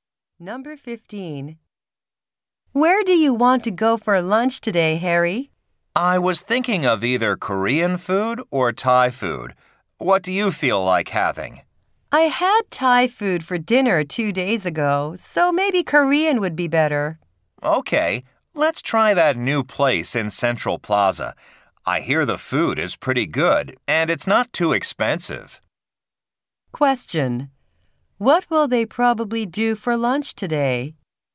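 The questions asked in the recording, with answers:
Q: What will they probably do for lunch today?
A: Try the new Korean restaurant in Central Plaza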